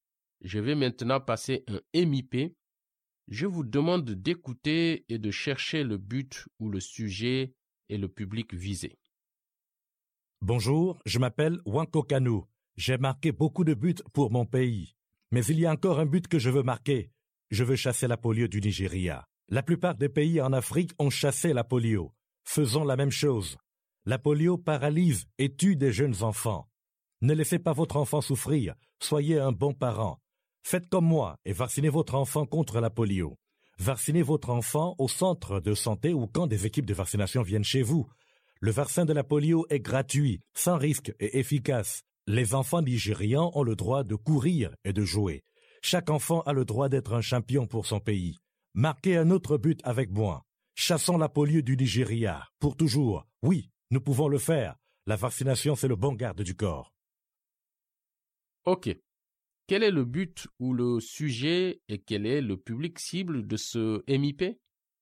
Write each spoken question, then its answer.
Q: Quel est le but ou le sujet et quel est le public cible de ce MIP?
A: C'est ça. Encourager les parents à faire vacciner leurs enfants contre la polio pour éliminer la polio au Nigeria.